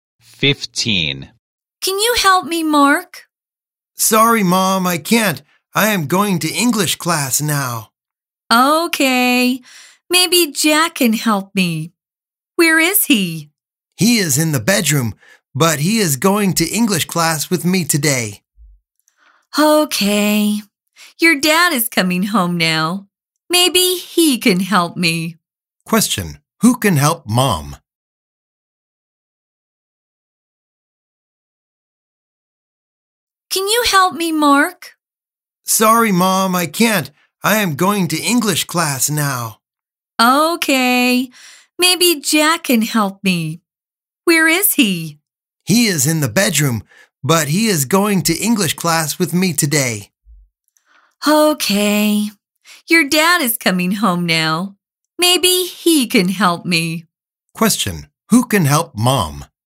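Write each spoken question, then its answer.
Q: Who can help Mom?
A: Dad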